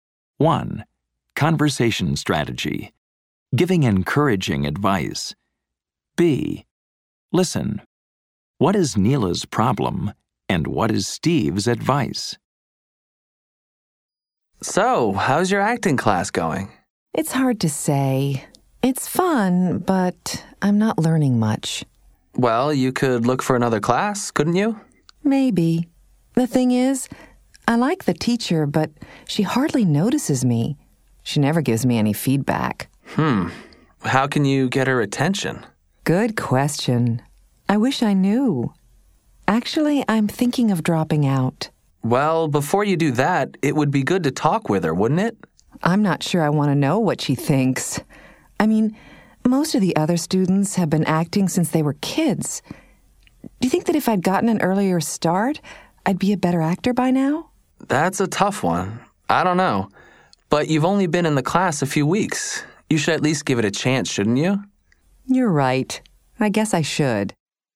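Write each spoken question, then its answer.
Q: What is Neela's problem and what is Steve's advice?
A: Her acting teacher hardly notices her or gives feedback and she's thinking of dropping out; Steve advises her to talk with the teacher and give the class a chance.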